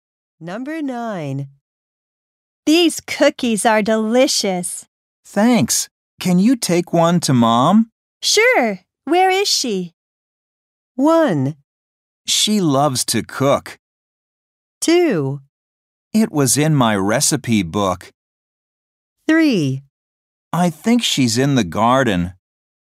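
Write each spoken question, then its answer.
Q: Sure. Where is she?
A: 3: I think she's in the garden.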